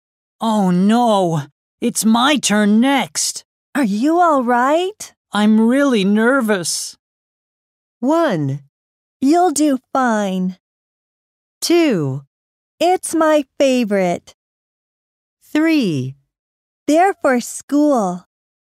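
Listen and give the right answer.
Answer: 1: You'll do fine.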